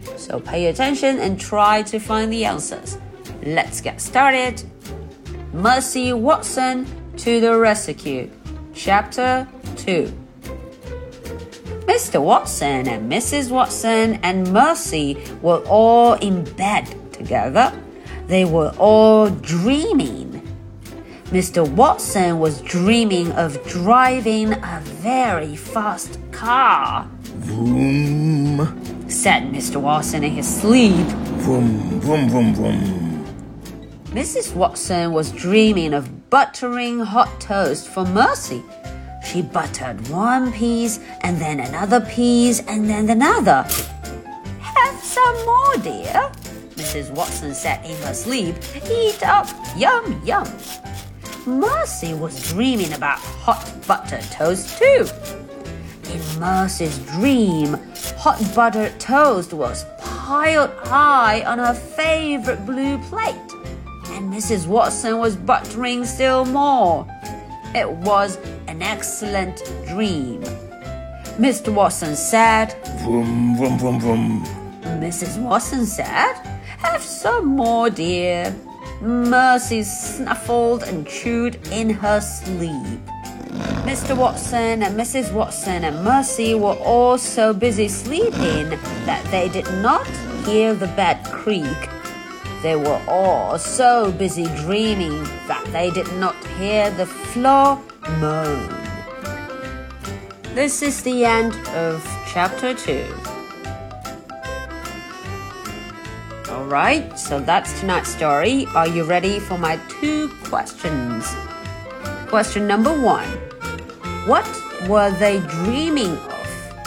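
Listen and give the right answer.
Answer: Mr. Watson dreamed of driving a very fast car; Mrs. Watson and Mercy dreamed of hot buttered toast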